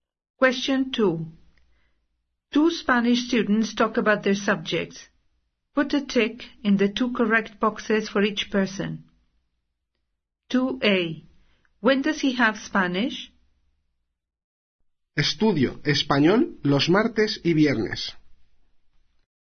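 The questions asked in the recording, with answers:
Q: When does he have Spanish?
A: Tuesdays and Fridays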